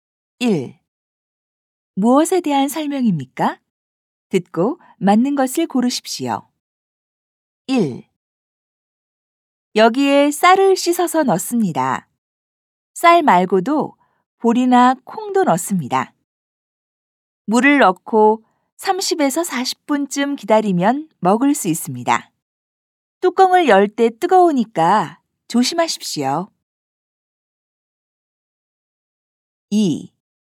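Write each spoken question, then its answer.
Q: 무엇에 대한 설명입니까?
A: 밥솥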